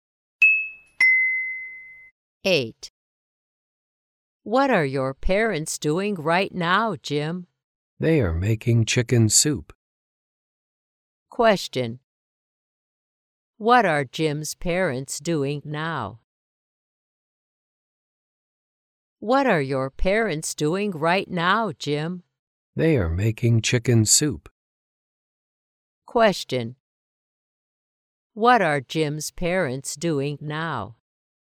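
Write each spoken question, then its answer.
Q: What are Jim's parents doing now?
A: Making chicken soup.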